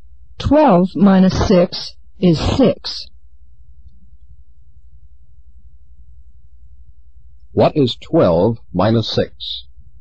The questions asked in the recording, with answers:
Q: 12 minus 6?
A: 12 minus 6 is 6.